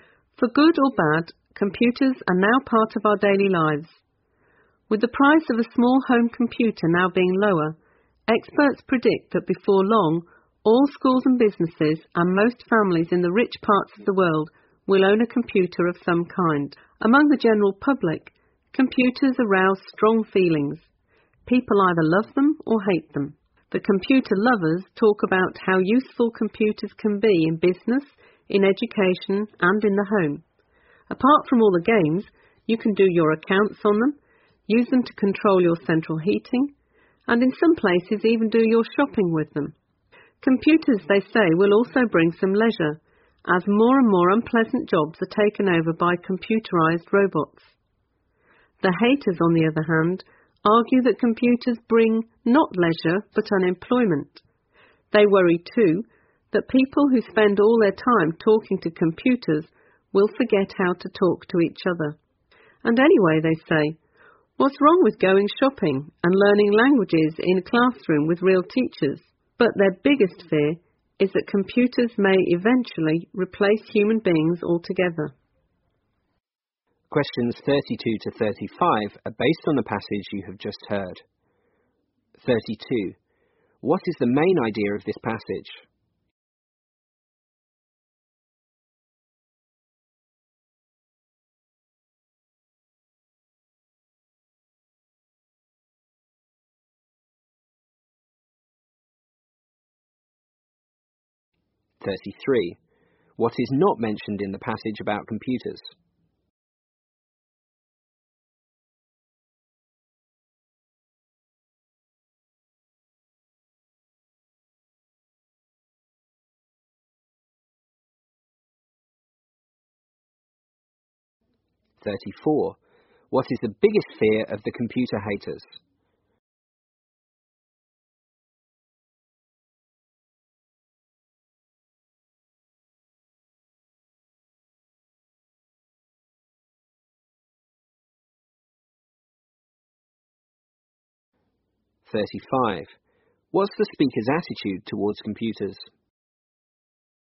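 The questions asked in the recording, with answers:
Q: What is the main idea of this passage?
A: People have strongly differing views about computers: some love them, others hate them.

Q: What is the biggest fear of the computer haters?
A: That computers may eventually replace human beings altogether.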